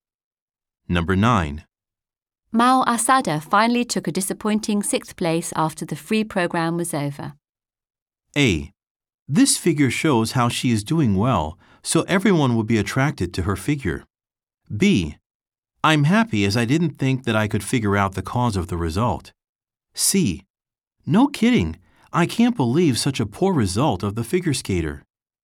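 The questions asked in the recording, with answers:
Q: Mao Asada finally took a disappointing 6th place after the free program was over.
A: C: No kidding, I can't believe such a poor result of the figure skater.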